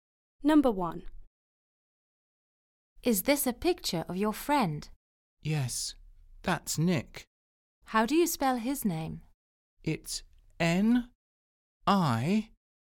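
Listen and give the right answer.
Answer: Nick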